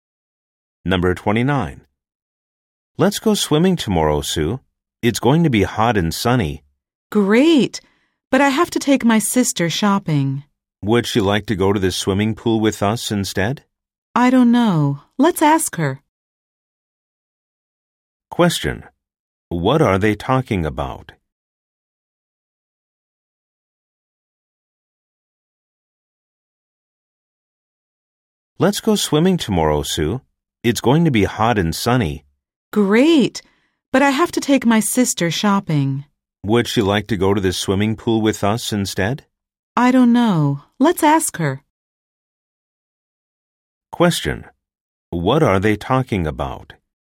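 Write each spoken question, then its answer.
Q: What are they talking about?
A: Going swimming tomorrow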